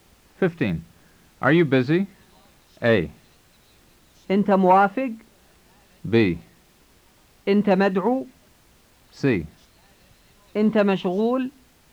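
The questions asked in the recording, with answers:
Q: Are you busy?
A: C: أنت مشغول؟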